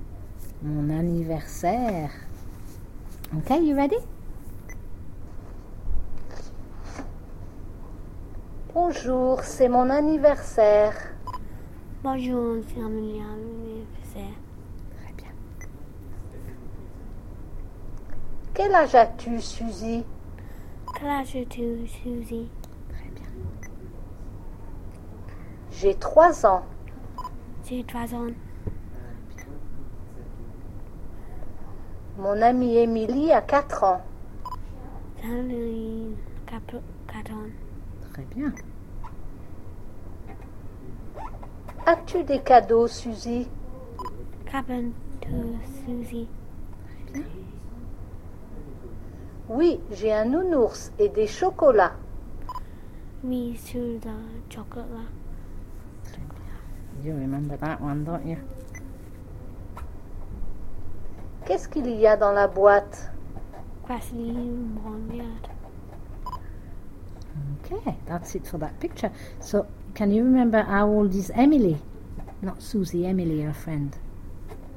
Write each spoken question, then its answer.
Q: So, can you remember how old is Emily?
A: mon amie Emily a 4 ans.